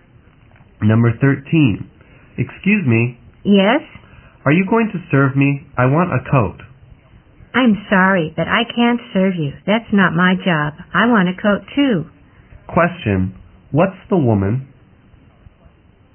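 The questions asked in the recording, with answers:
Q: What's the woman?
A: A customer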